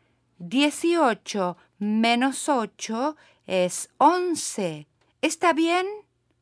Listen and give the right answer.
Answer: No, está mal.